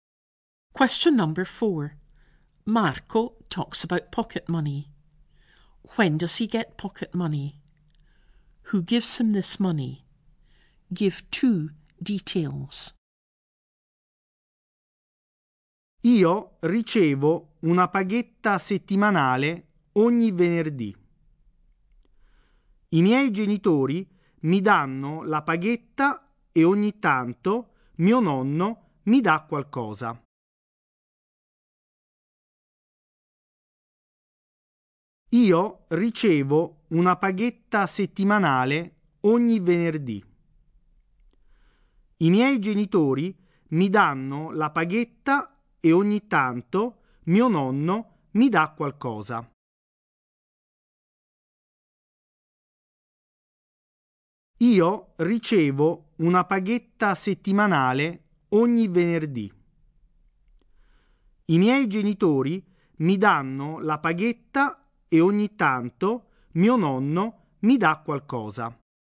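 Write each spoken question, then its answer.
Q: When does he get pocket money?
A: Every Friday (weekly)

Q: Who gives him this money?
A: His parents, and sometimes his grandfather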